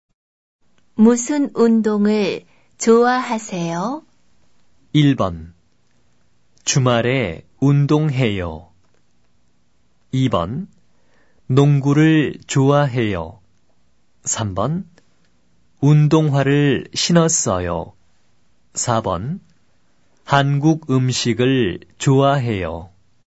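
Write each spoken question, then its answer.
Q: 무슨 운동을 좋아하세요?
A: 2번: 농구를 좋아해요.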